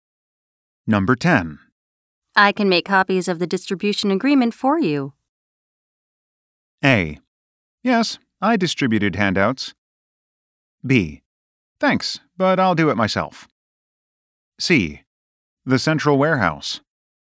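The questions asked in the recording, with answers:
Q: I can make copies of the distribution agreement for you.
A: B: Thanks, but I'll do it myself.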